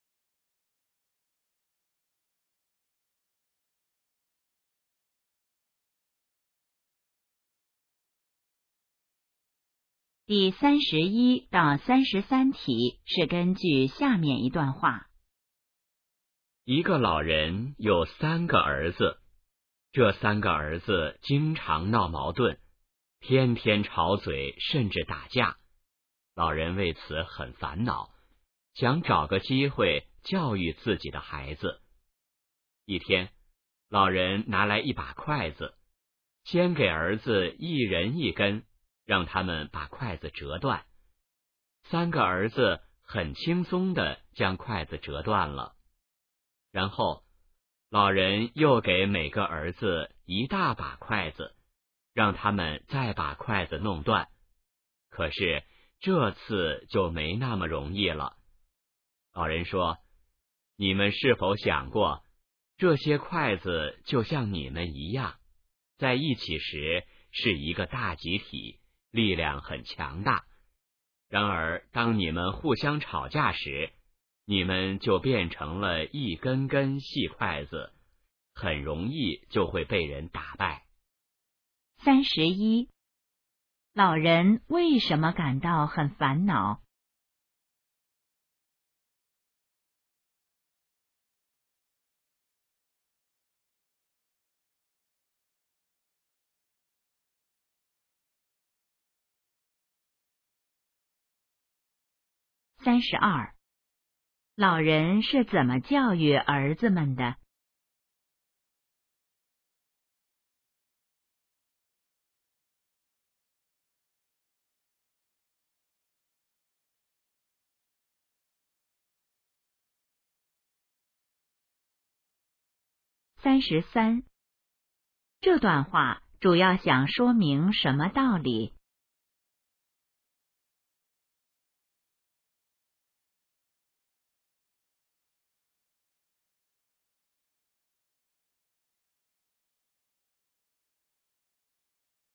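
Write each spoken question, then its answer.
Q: 老人为什么感到很烦恼?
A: 三个儿子经常闹矛盾

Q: 老人是怎么教育儿子们的?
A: 让他们折筷子

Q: 这段话主要想说明什么道理?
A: 团结力量大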